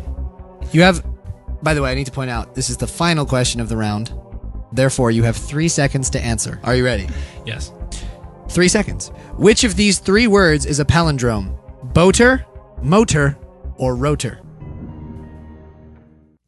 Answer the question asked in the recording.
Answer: Rotor.